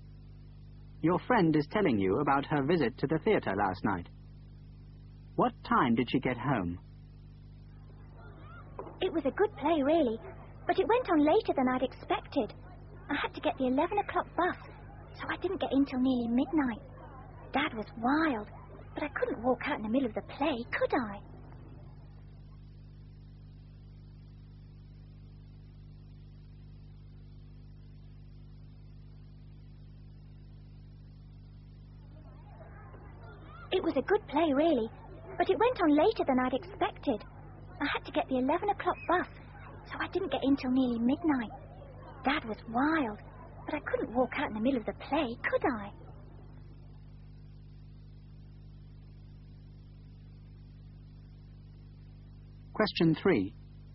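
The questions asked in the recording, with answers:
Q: What time did she get home?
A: Nearly midnight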